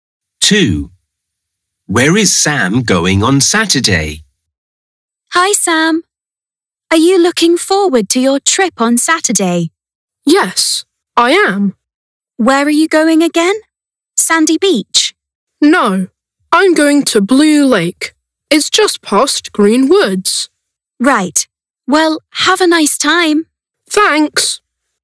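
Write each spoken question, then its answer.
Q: Where is Sam going on Saturday?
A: Blue Lake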